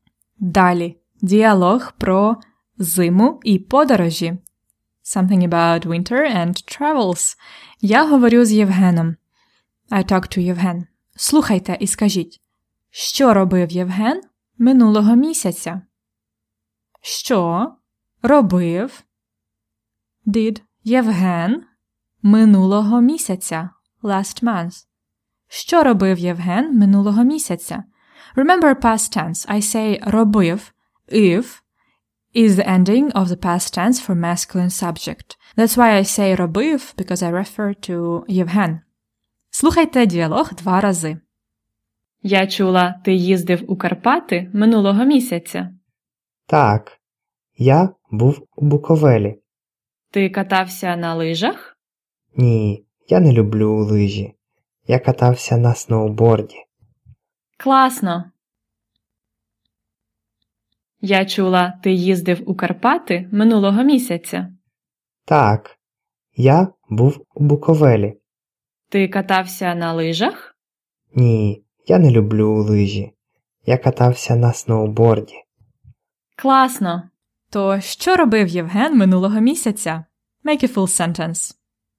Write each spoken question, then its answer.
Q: Що робив Євген минулого місяця?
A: Євген був у Буковелі і катався на сноуборді.